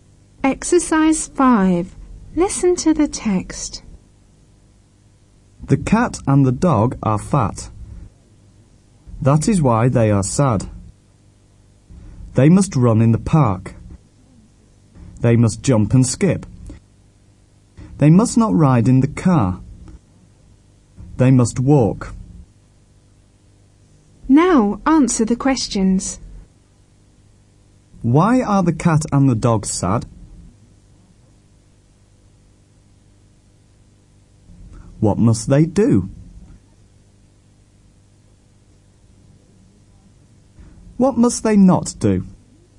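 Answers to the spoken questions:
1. Because they are fat.
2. They must run in the park, jump and skip, and walk.
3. They must not ride in the car.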